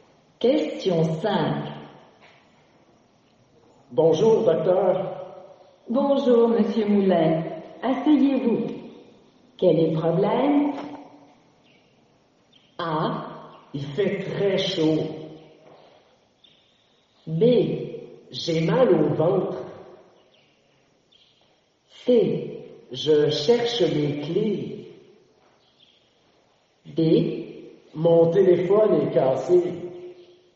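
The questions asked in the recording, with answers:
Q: Quel est le problème?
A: B: J'ai mal au ventre.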